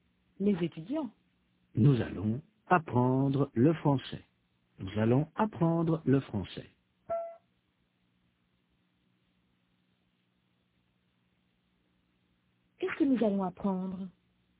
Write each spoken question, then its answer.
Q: Qu'est-ce que nous allons apprendre?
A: Le français.